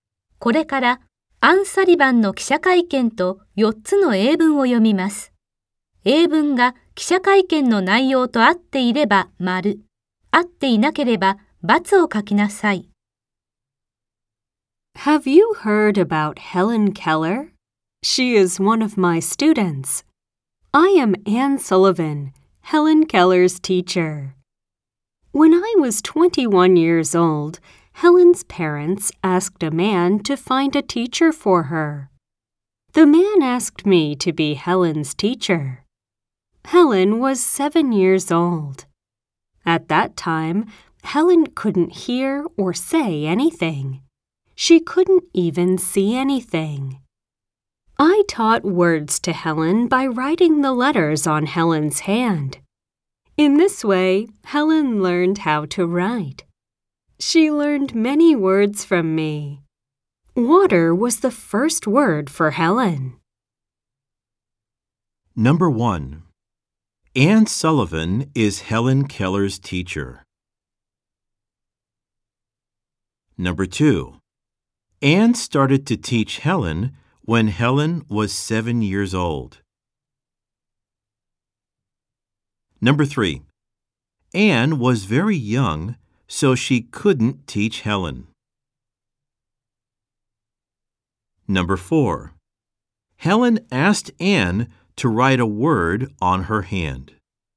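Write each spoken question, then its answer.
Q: Anne Sullivan is Helen Keller's teacher.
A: True (○)

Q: Anne started to teach Helen when Helen was 7 years old.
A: True (○)

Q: Anne was very young, so she couldn't teach Helen.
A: False (×)

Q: Helen asked Anne to write a word on her hand.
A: False (×)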